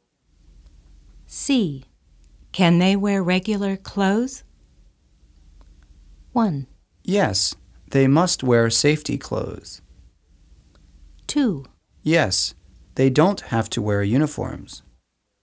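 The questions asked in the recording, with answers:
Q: Can they wear regular clothes?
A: 2: Yes, they don't have to wear uniforms.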